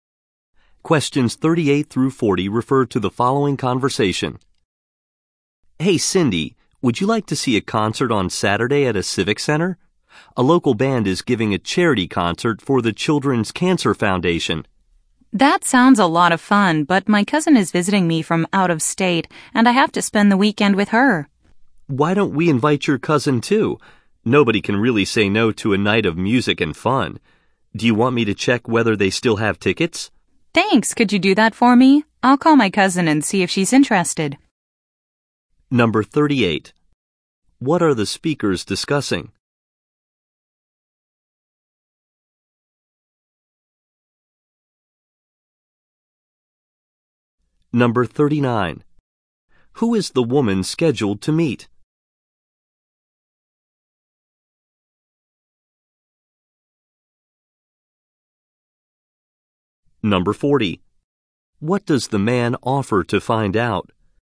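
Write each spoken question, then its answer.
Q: What are the speakers discussing?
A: A charity concert on Saturday

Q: Who is the woman scheduled to meet?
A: Her cousin

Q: What does the man offer to find out?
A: Whether tickets are still available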